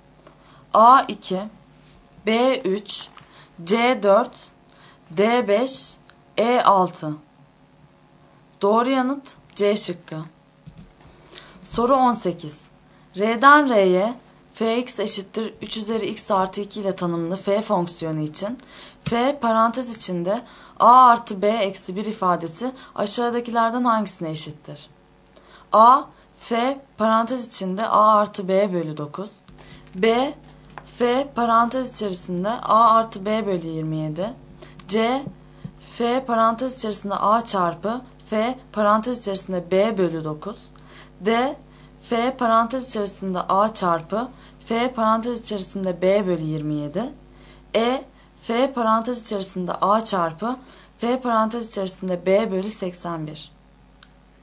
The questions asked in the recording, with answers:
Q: R'den R'ye fx eşittir 3 üzeri x artı 2 ile tanımlı f fonksiyonu için f parantez içinde a artı b eksi 1 ifadesi aşağıdakilerden hangisine eşittir?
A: Doğru yanıt D şıkkı.